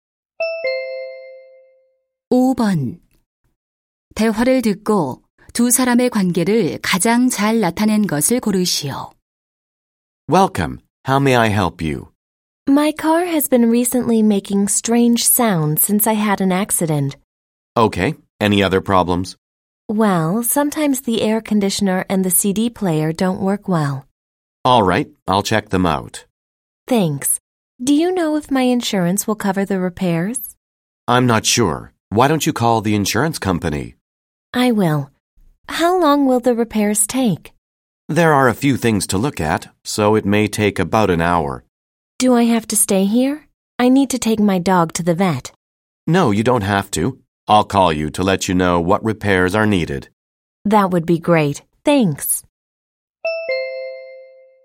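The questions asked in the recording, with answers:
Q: 대화를 듣고 두 사람의 관계를 가장 잘 나타낸 것을 고르시오.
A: 고객 - 자동차 정비사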